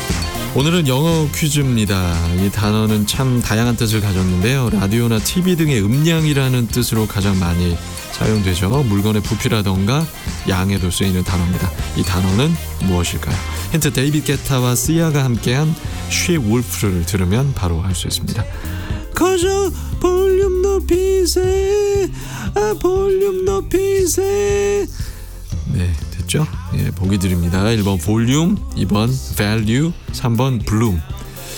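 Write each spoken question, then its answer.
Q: 이 단어는 무엇일까요?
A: 1번: 볼륨 (volume)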